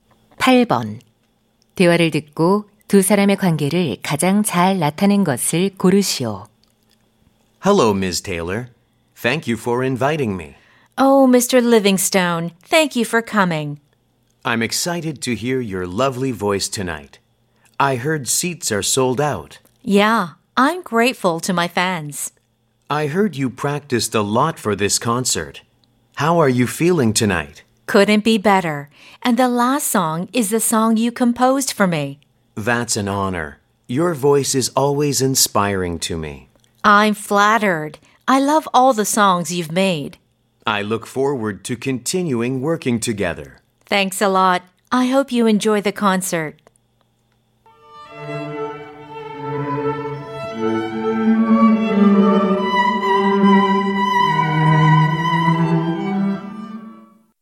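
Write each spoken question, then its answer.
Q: 대화를 듣고 두 사람의 관계를 가장 잘 나타낸 것을 고르시오.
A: 가수와 작곡가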